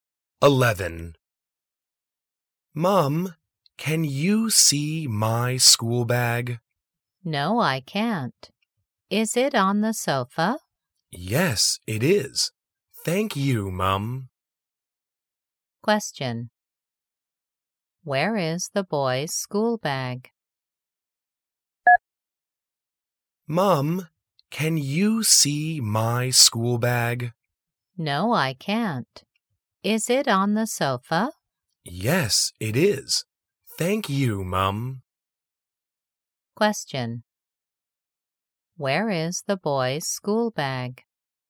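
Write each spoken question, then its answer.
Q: Where is the boy's school bag?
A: On the sofa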